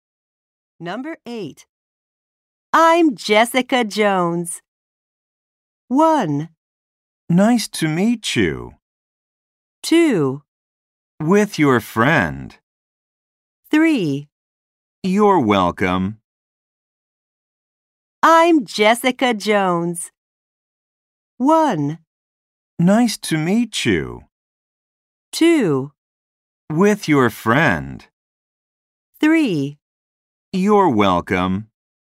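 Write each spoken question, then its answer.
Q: I'm Jessica Jones.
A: 1: Nice to meet you.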